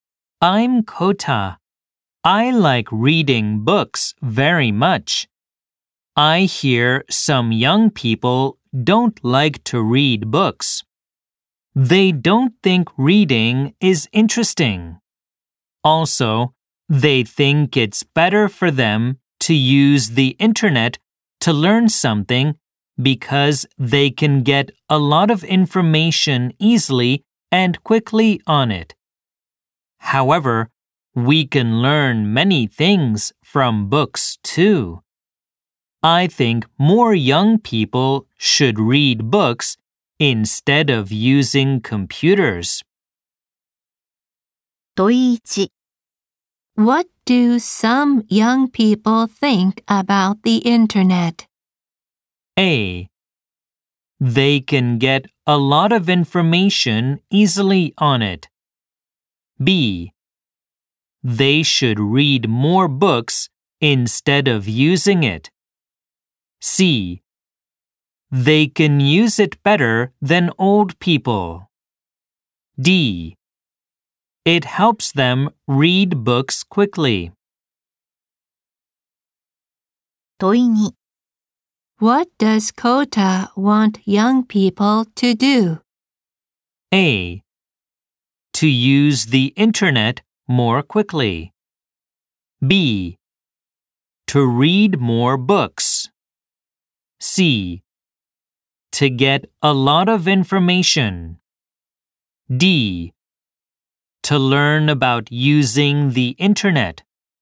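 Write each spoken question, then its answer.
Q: What do some young people think about the internet?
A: A: They can get a lot of information easily on it.

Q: What does Kota want young people to do?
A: B: To read more books.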